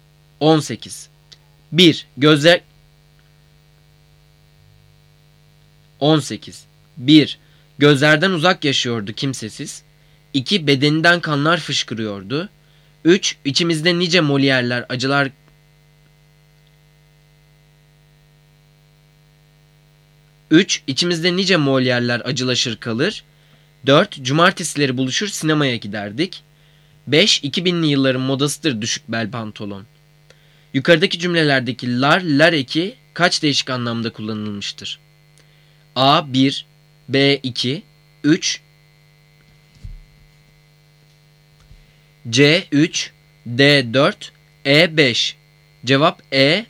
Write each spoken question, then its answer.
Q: Yukarıdaki cümlelerdeki lar, lar eki kaç değişik anlamda kullanılmıştır?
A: Cevap E.